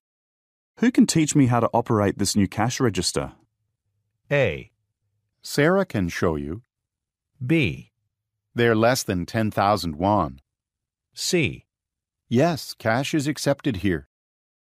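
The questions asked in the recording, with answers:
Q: Who can teach me how to operate this new cash register?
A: A: Sarah can show you.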